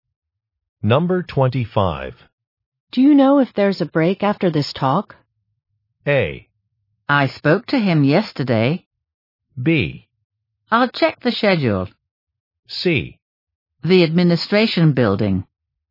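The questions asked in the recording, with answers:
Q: Do you know if there's a break after this talk?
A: B: I'll check the schedule.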